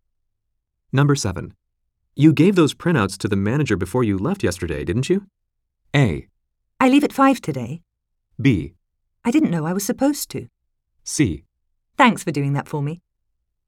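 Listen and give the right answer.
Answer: B: I didn't know I was supposed to.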